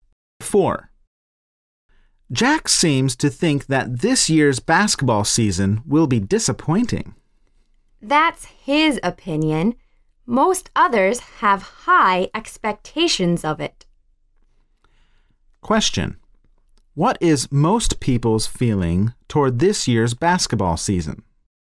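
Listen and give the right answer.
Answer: They have high expectations of it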